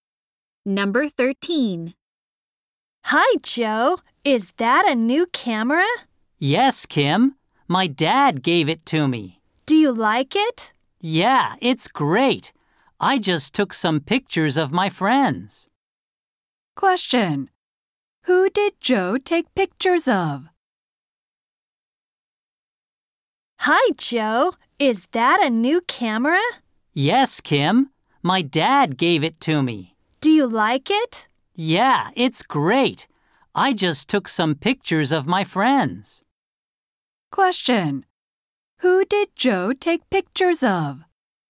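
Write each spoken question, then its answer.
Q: Who did Joe take pictures of?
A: His friends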